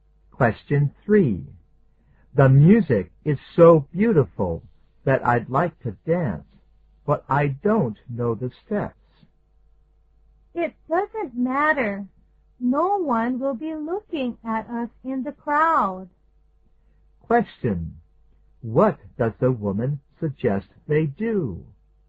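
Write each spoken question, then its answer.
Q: What does the woman suggest they do?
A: Dance anyway, since no one will notice in the crowd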